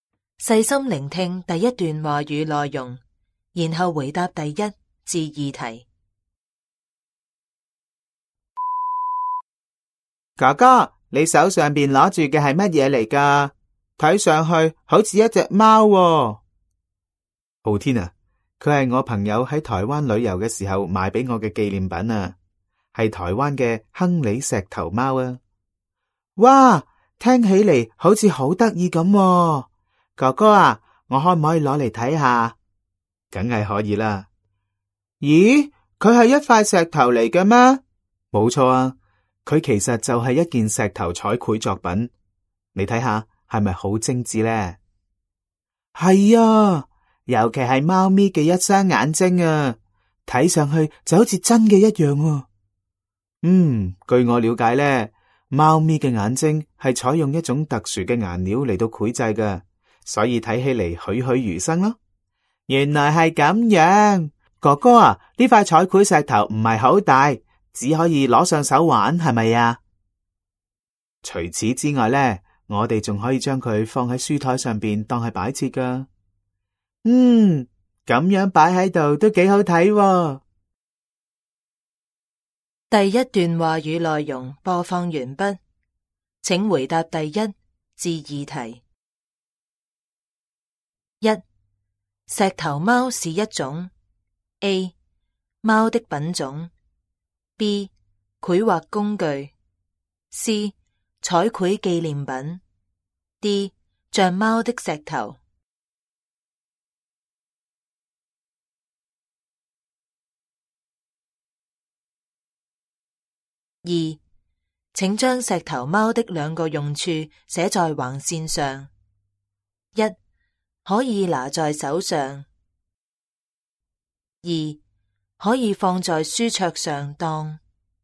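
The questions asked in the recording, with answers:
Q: 石头猫是一种 A, 猫的品种 B, 绘画工具 C, 彩绘纪念品 D, 像猫的石头。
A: C: 彩绘纪念品

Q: 请将石头猫的两个用处写在横线上。一,可以拿在手上。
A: 摆设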